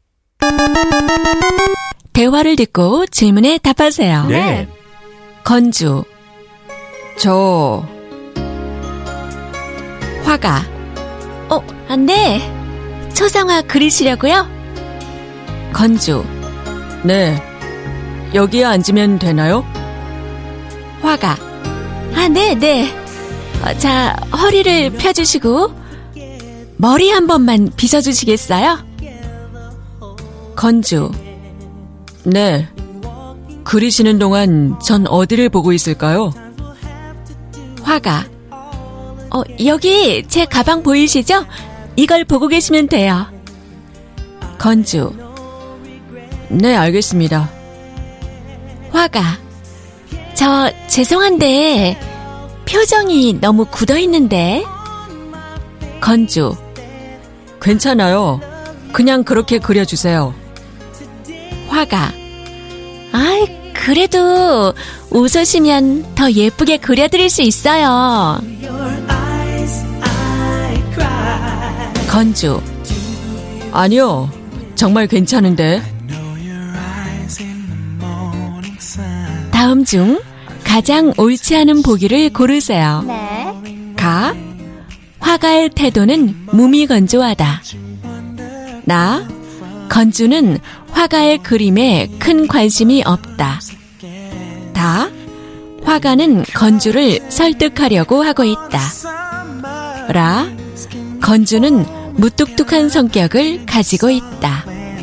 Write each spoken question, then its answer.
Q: 다음 중 가장 옳지 않은 보기를 고르세요.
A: It is. Ga! The artist has an indifferent attitude because it's not the artist.